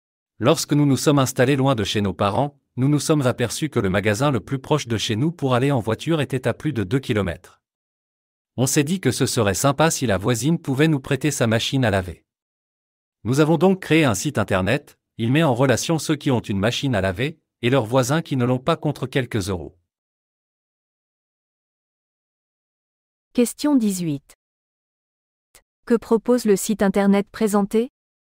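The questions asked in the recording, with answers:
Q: Que propose le site internet présenté ?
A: De mettre en relation ceux qui ont une machine à laver avec leurs voisins qui n'en ont pas, contre quelques euros.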